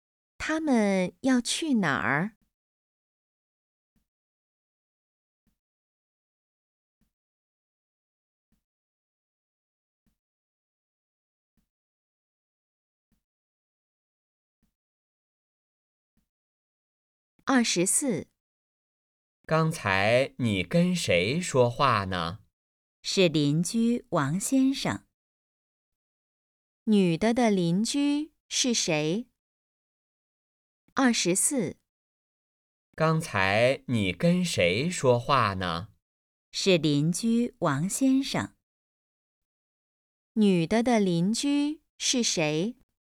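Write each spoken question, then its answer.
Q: 女的的邻居是谁?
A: 王先生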